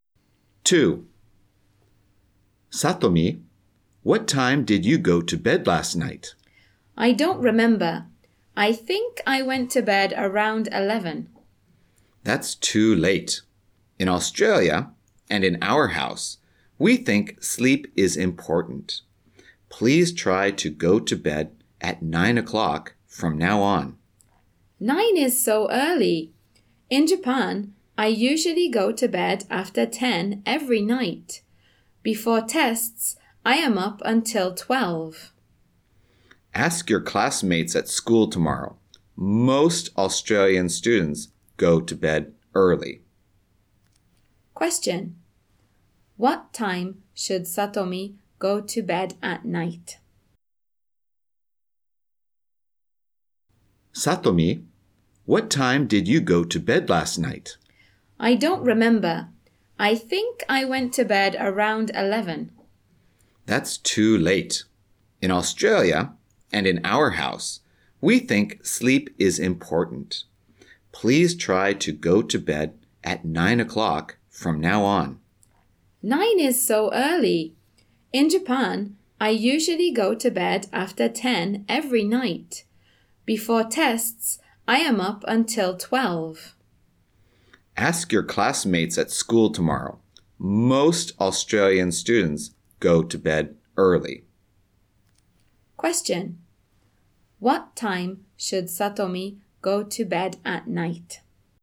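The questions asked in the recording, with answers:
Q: What time should Satomi go to bed at night?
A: At 9 o'clock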